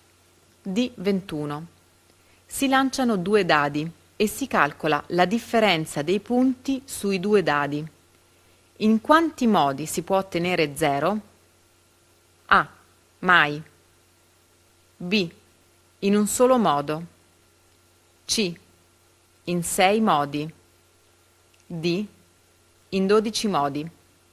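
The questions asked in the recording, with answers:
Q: In quanti modi si può ottenere 0?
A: C: In 6 modi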